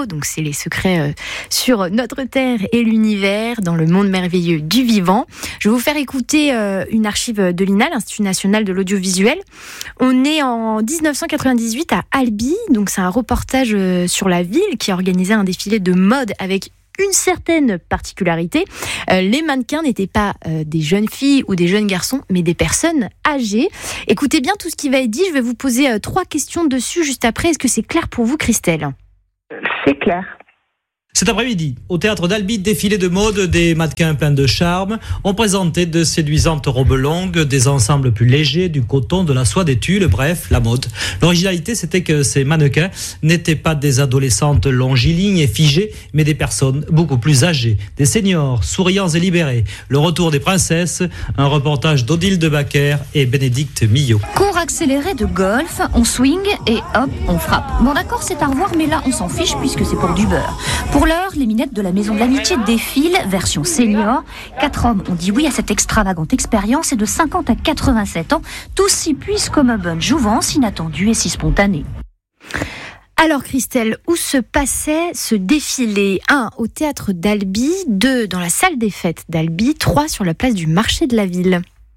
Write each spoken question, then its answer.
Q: Alors Christelle, où se passait ce défilé?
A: Au théâtre d'Albi.